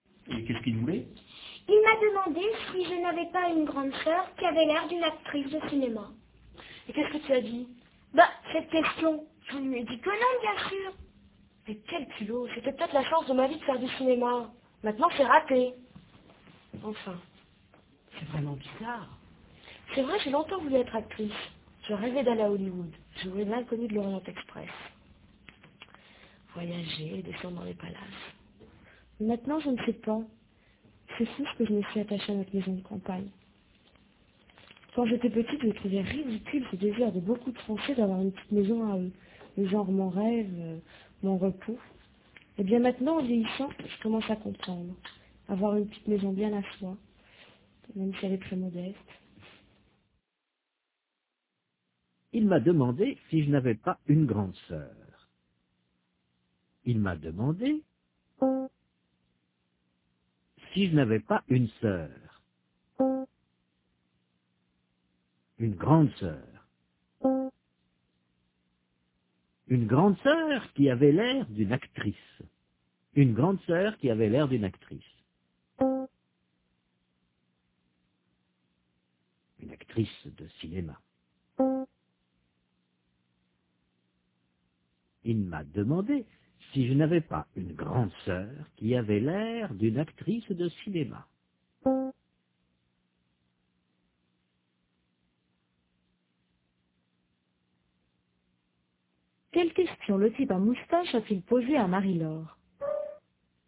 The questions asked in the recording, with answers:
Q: Quelle question le type à moustache a-t-il posée à Marie-Laure?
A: Il lui a demandé si elle n'avait pas une grande sœur qui avait l'air d'une actrice de cinéma.